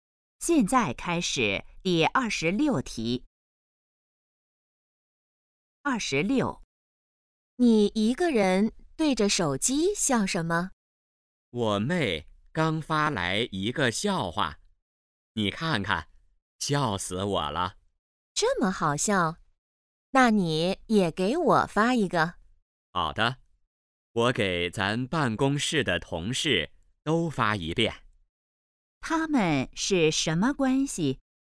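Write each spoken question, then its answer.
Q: 他们是什么关系?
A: 同事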